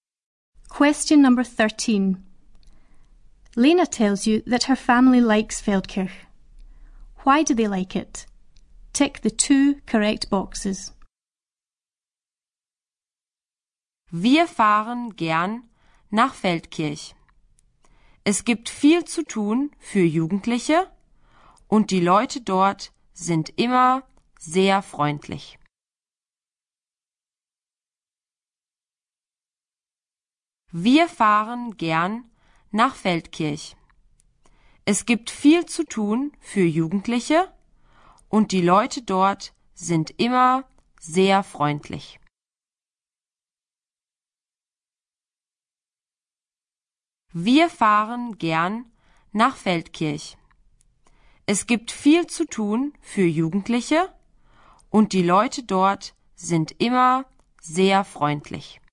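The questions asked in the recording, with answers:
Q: Why do they like it?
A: There is a lot for young people to do and the people are always very friendly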